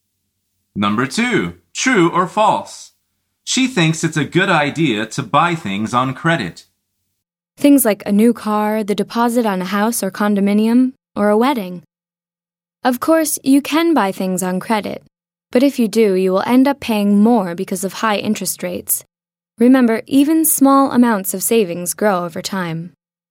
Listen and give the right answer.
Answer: The answer is false. She says, if you do, you will end up paying more because of high interest rates.